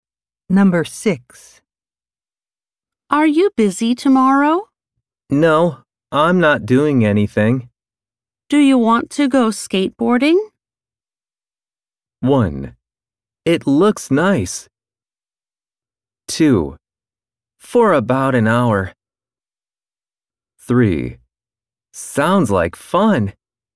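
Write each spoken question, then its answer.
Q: Do you want to go skateboarding?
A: 3: Sounds like fun.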